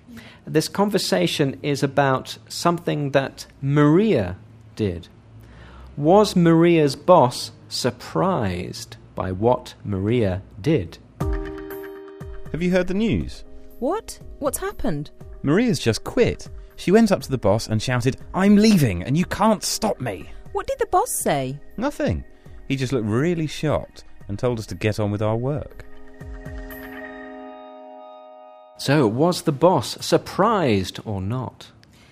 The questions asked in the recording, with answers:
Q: Was Maria's boss surprised by what Maria did?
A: Exactly, yes. The boss was surprised.